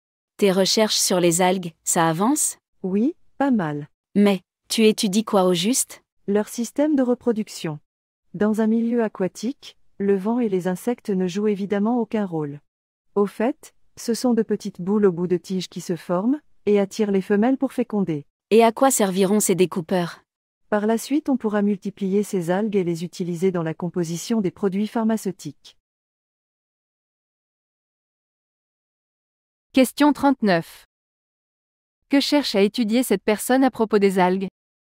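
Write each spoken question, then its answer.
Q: Que cherche à étudier cette personne à propos des algues?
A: Leur système de reproduction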